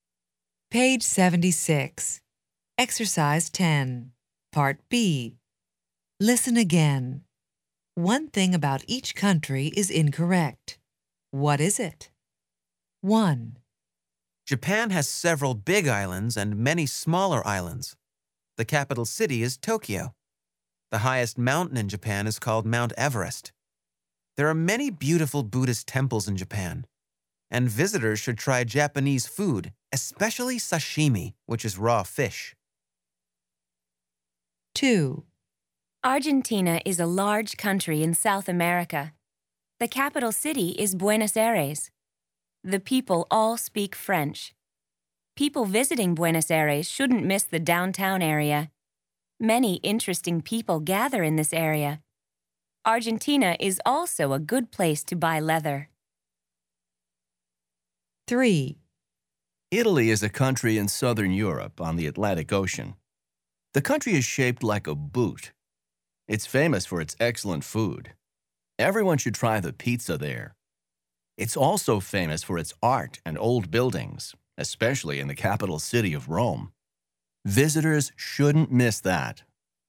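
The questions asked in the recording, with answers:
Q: What is it?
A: The highest mountain in Japan is Mount Fuji, not Mount Everest.

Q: What is it?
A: The people speak Spanish, not French.

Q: What is it?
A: Italy is on the Mediterranean Sea, not the Atlantic Ocean.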